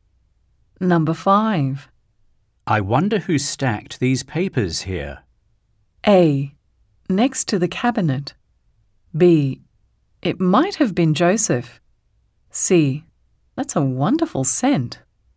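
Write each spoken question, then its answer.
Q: I wonder who stacked these papers here.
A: B: It might have been Joseph.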